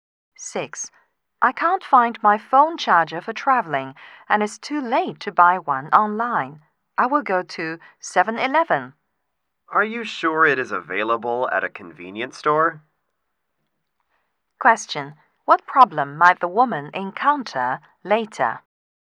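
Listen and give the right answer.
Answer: The convenience store may not have a phone charger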